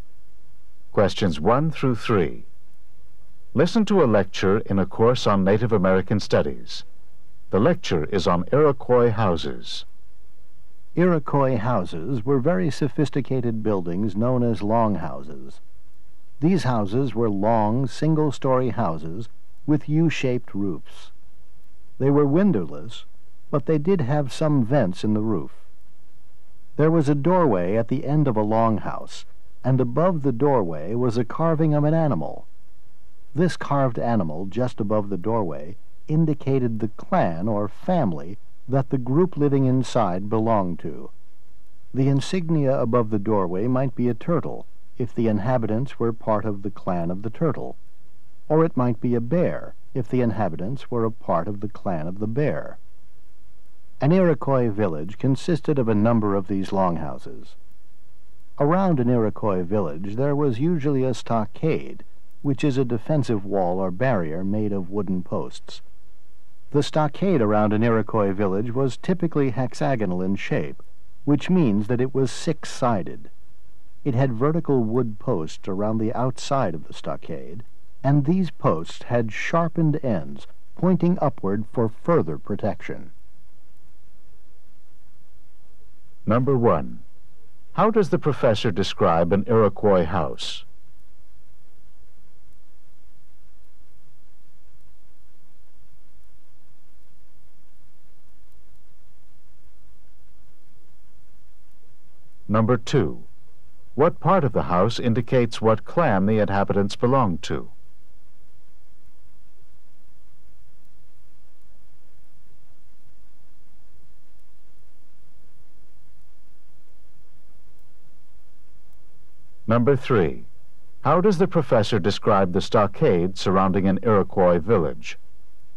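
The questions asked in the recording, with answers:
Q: How does the professor describe an Iroquois house?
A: A long, single-story, windowless house with a U-shaped roof

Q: What part of the house indicates what clan the inhabitants belong to?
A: The carving of an animal above the doorway

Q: How does the professor describe the stockade surrounding an Iroquois village?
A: Six-sided (hexagonal), with vertical wood posts sharpened at the top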